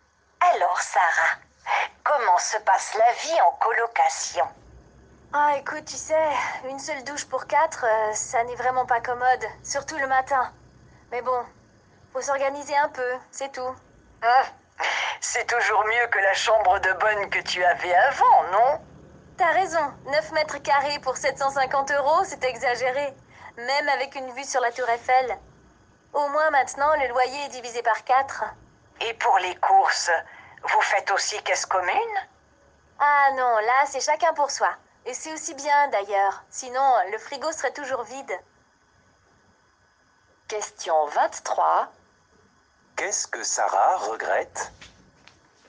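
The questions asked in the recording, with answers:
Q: Qu'est-ce que Sarah regrette?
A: Il n'y a qu'une seule douche pour quatre personnes.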